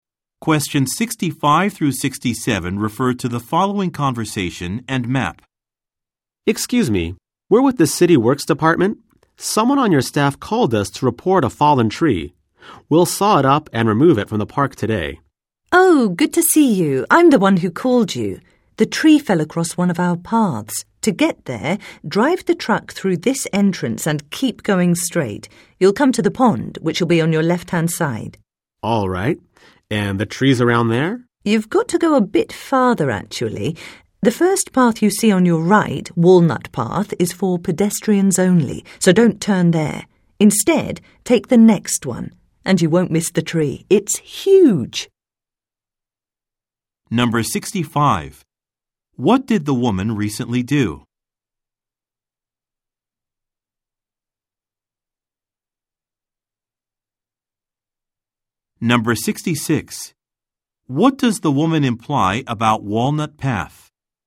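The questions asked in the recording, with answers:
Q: What did the woman recently do?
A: She called the City Works Department to report a fallen tree.

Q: What does the woman imply about Walnut Path?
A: It is for pedestrians only, so the truck cannot use it.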